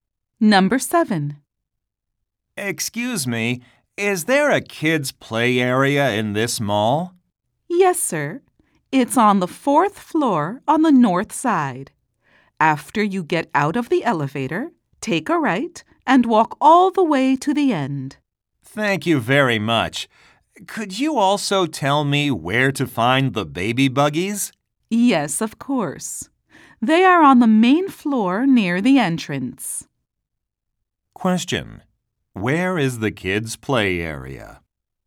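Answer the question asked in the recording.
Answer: On the 4th floor on the north side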